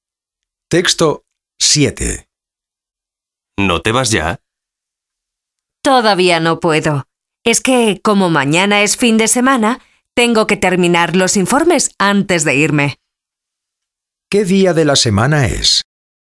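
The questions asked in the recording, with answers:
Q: ¿Qué día de la semana es?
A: Viernes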